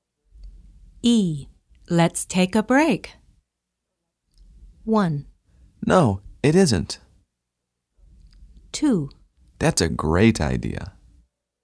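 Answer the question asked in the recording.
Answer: 2: That's a great idea.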